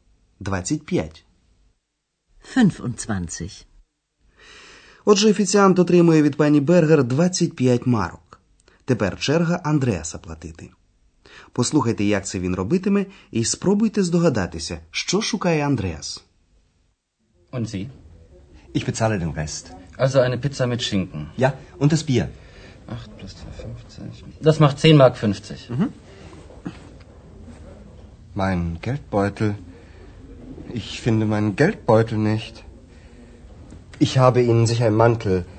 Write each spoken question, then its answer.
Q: спробуйте здогадатися, що шукає Андреас.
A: А вони, звісно, знаходяться у гельдбойтель – тобто в гаманці.